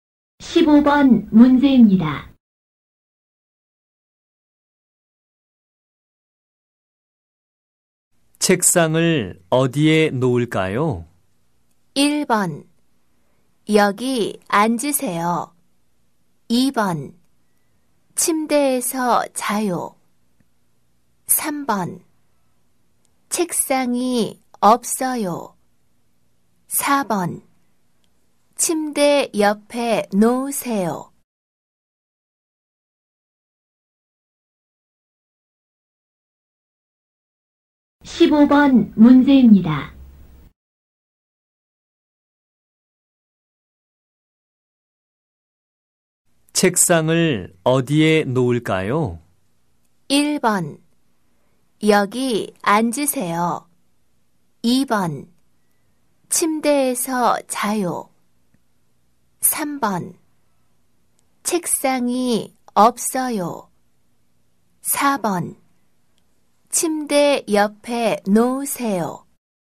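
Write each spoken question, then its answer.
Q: 책상을 어디에 놓을까요?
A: 4: 침대 옆에 놓으세요.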